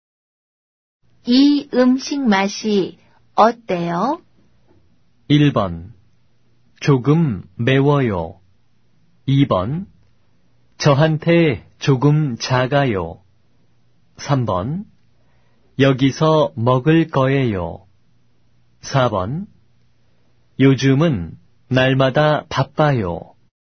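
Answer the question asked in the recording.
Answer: 1: 조금 매워요.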